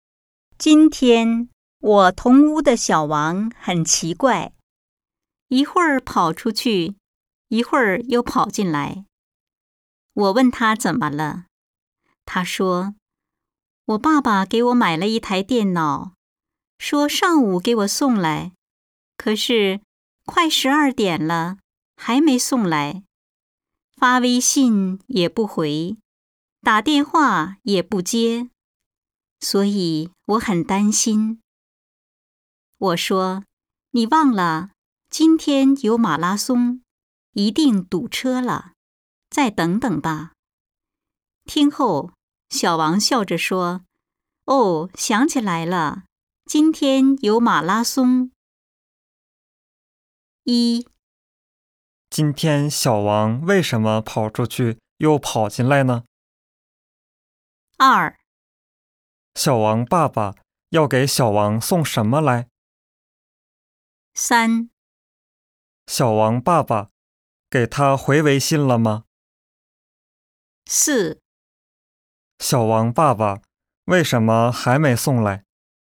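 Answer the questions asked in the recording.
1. 他在等爸爸送电脑,爸爸还没送来,他很担心
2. 一台电脑
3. 没有
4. 今天有马拉松,堵车了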